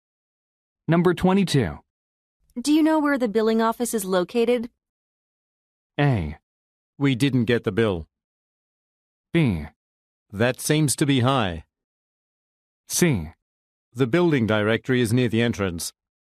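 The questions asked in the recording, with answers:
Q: Do you know where the billing office is located?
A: C: The building directory is near the entrance.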